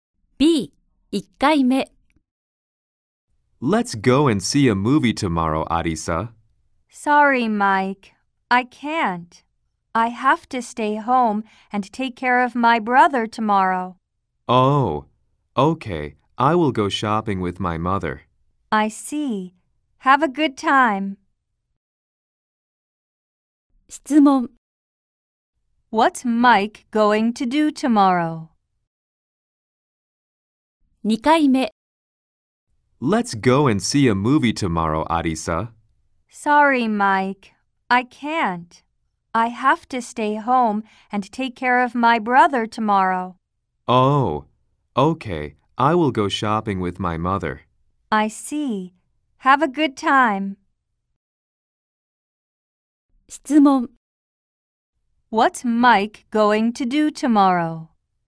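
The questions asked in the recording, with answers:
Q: What's Mike going to do tomorrow?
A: Go shopping with his mother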